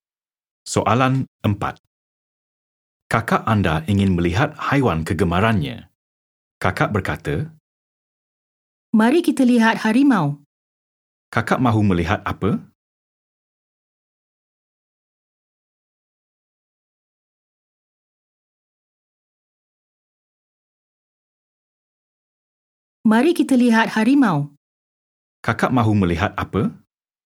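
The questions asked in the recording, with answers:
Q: Kakak mahu melihat apa?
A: Harimau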